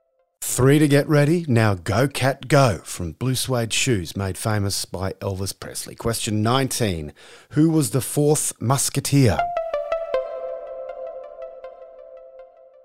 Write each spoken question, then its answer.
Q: Who was the fourth musketeer?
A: D'Artagnan.